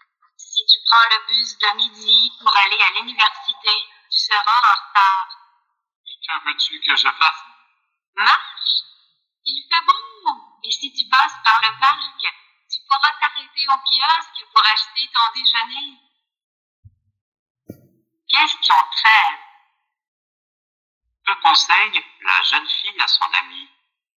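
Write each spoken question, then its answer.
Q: Que conseille la jeune fille à son amie?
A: D'aller à pied (en passant par le parc)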